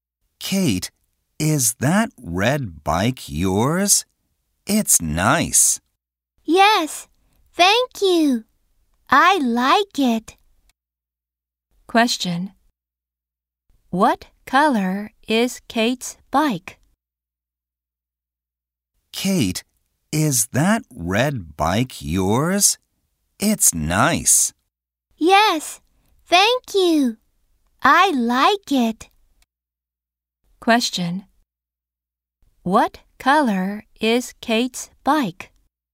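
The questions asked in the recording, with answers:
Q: What color is Kate's bike?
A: Red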